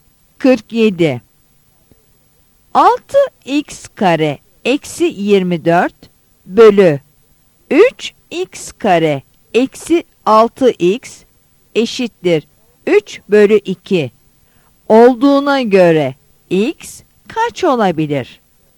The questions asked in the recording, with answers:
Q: 6x kare eksi 24 bölü 3x kare eksi 6x eşittir 3 bölü 2 olduğuna göre x kaç olabilir?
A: Yanıt E'dir.